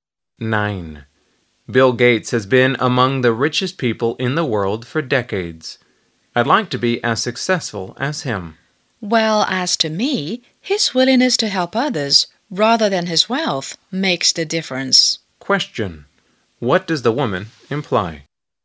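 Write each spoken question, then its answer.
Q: What does the woman imply?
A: Gates's willingness to help others matters more than his wealth.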